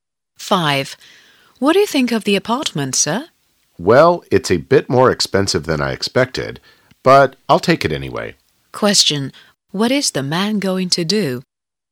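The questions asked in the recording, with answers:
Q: What is the man going to do?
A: Take (rent) the apartment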